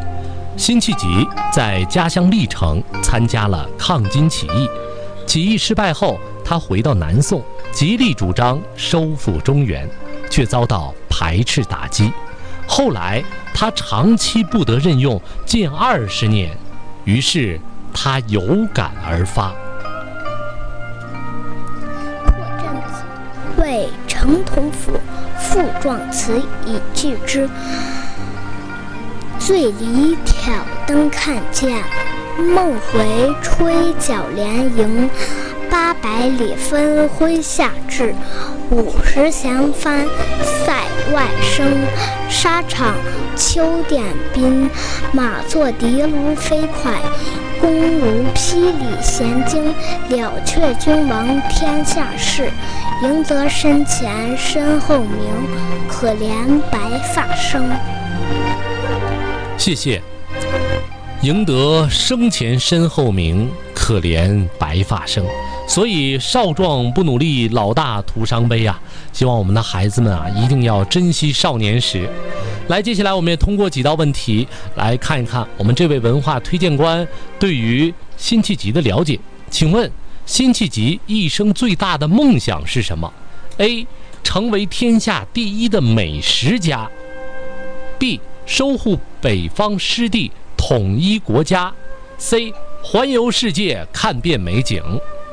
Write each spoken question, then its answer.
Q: 请问辛弃疾一生最大的梦想是什么?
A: 他从小啊就希望能够带领军队收复失地,这也是他一生的梦想。